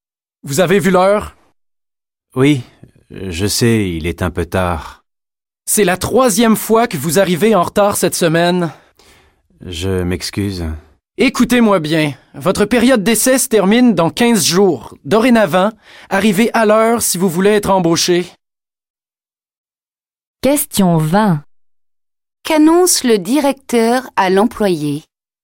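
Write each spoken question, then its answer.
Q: Qu'annonce le directeur à l'employé?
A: Il doit arriver à l'heure s'il veut être embauché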